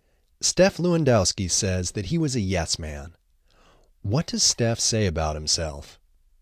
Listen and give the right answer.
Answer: Steph says that he was a yes man.